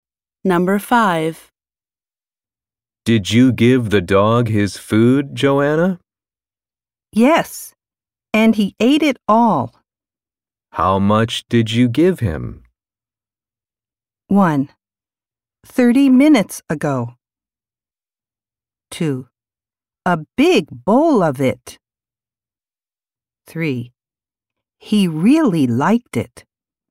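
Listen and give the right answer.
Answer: 2: A big bowl of it.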